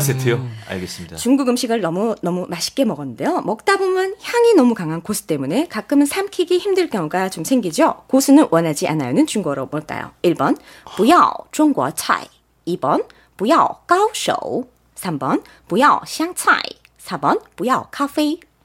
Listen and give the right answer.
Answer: 3번 뿌요 시향 차이.